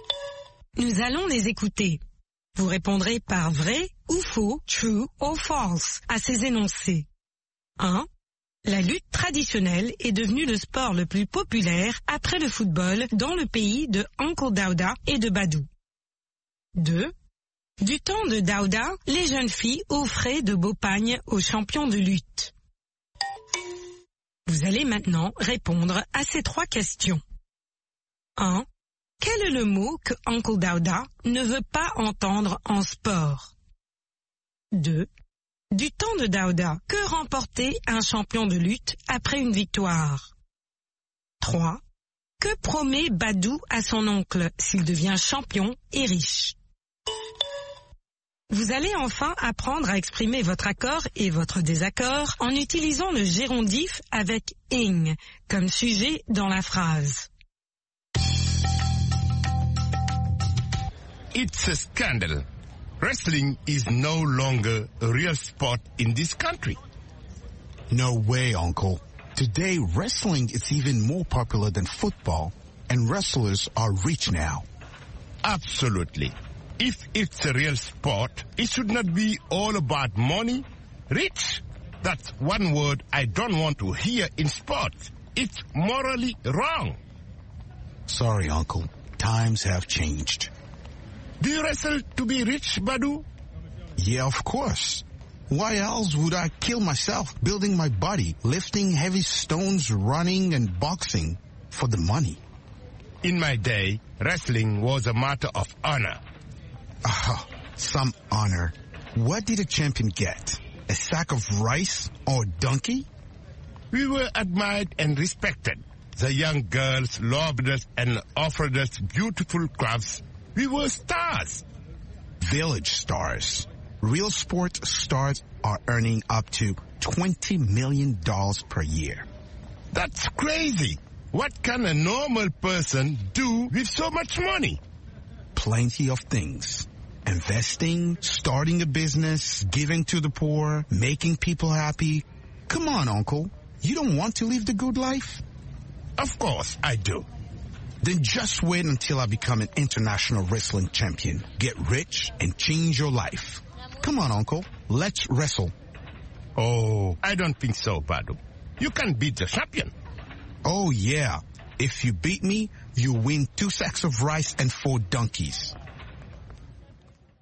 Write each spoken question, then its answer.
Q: La lutte traditionnelle est devenue le sport le plus populaire après le football dans le pays de Uncle Daouda et de Badou.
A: L'énoncé 1 est faux.

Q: Du temps de Daouda, les jeunes filles offraient de beaux pagnes aux champions de lutte.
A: L'énoncé 2 est vrai.

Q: Quel est le mot que Uncle Daouda ne veut pas entendre en sport?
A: Riche.

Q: Du temps de Daouda, que remportait un champion de lutte après une victoire?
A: Un sac de riz ou un âne?

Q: Que promet Badou à son oncle s'il devient champion et riche?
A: De changer la vie de son oncle.